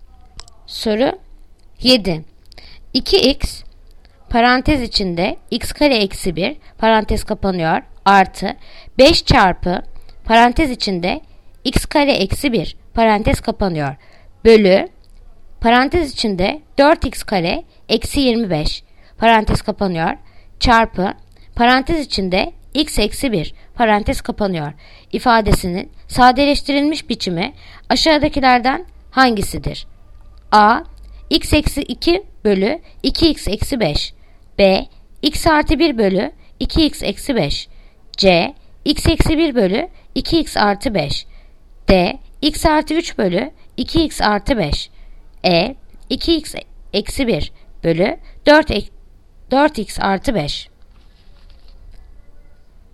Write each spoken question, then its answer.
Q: 2x parantez içinde x kare eksi 1 parantez kapanıyor artı 5 çarpı parantez içinde x kare eksi 1 parantez kapanıyor bölü parantez içinde 4x kare eksi 25 parantez kapanıyor çarpı parantez içinde x eksi 1 parantez kapanıyor ifadesinin sadeleştirilmiş biçimi aşağıdakilerden hangisidir?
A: Yanıt Bursa. X artı 1 bölü 2x eksi 5.